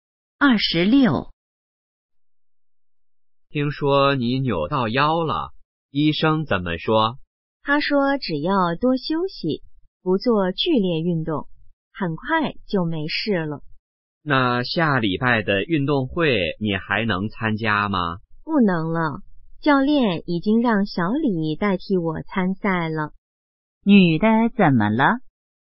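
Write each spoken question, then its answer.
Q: 女的怎么了?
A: 扭到腰了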